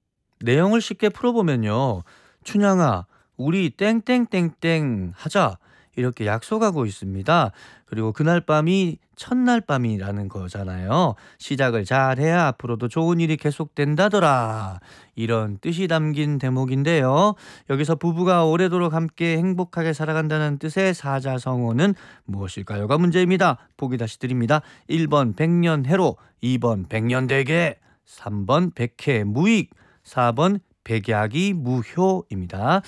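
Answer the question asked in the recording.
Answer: 1: 백년해로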